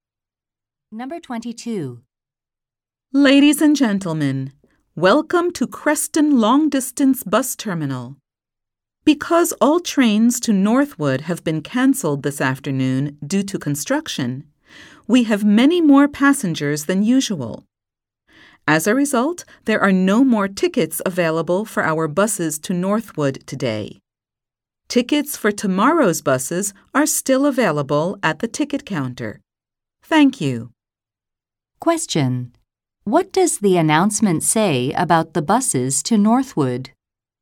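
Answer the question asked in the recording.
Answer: There are no more tickets for today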